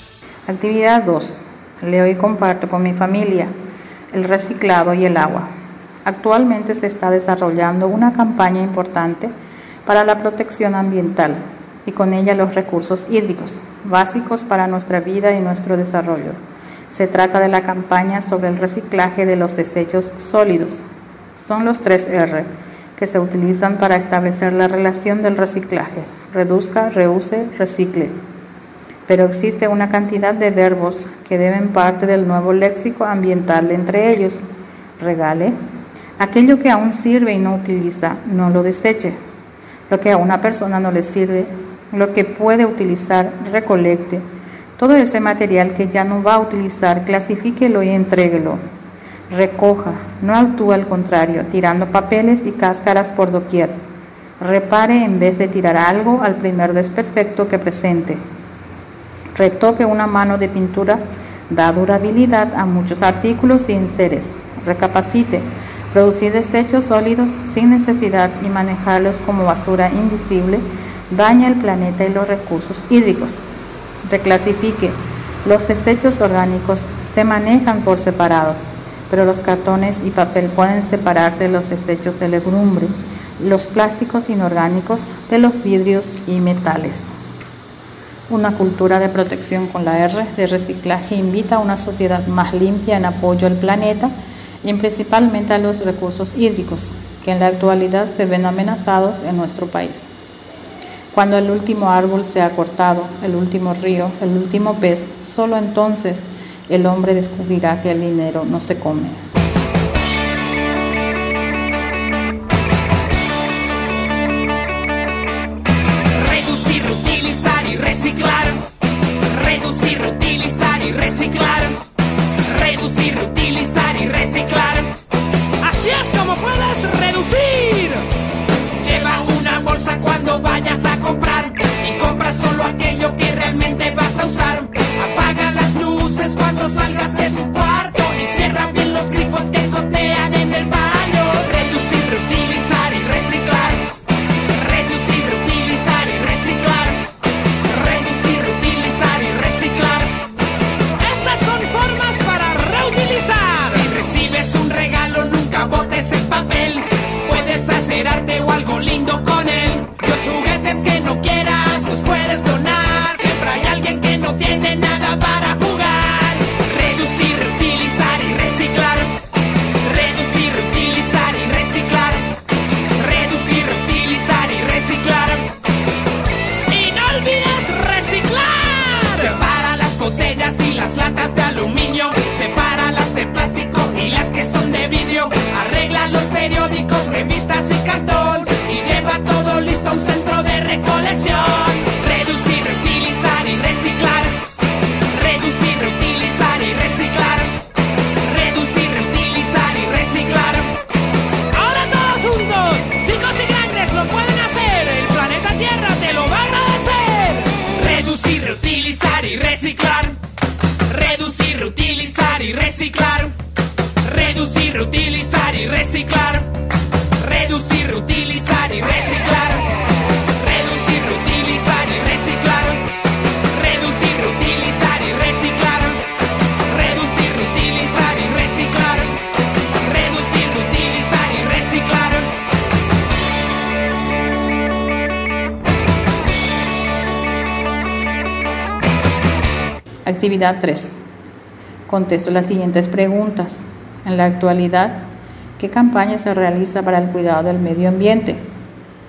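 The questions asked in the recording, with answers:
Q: En la actualidad, ¿qué campaña se realiza para el cuidado del medio ambiente?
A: La campaña sobre el reciclaje de los desechos sólidos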